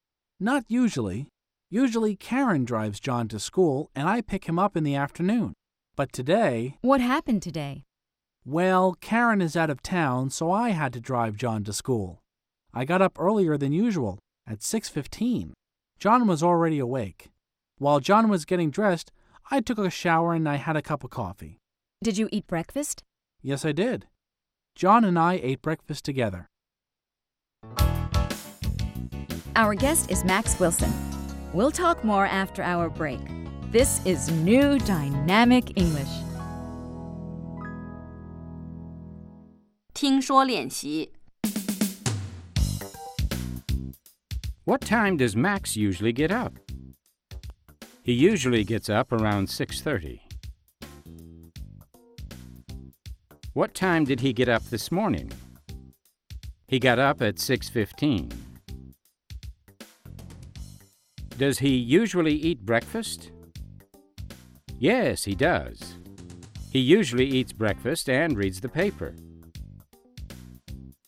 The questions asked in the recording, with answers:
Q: What time does Max usually get up?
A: He usually gets up around 6:30.